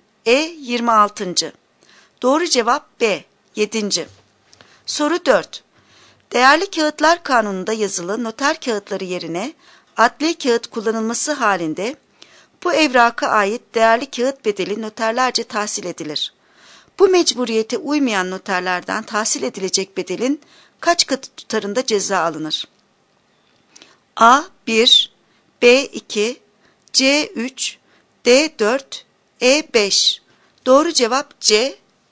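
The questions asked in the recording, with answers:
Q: Bu mecburiyete uymayan noterlerden tahsil edilecek bedelin kaç katı tutarında ceza alınır?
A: C: 3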